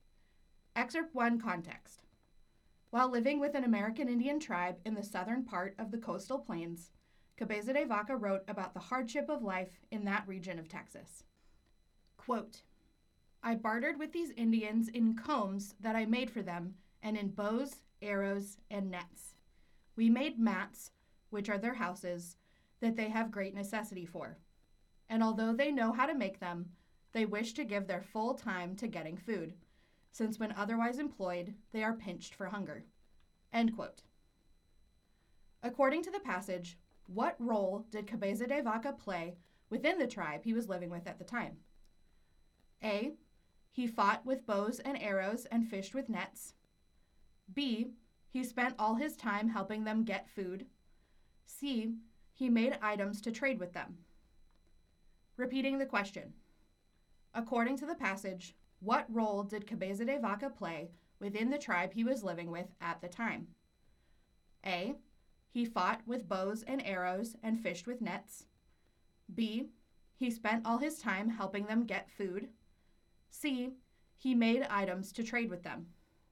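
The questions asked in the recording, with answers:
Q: According to the passage, what role did Cabeza de Vaca play within the tribe he was living with at the time?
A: C: He made items to trade with them.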